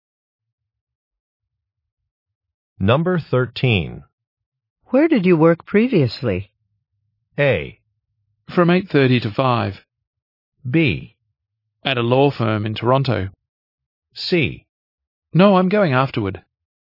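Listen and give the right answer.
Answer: B: At a law firm in Toronto.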